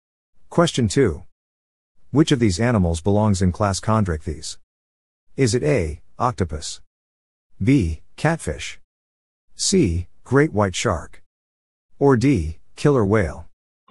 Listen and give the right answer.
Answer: The answer is C. Great white shark.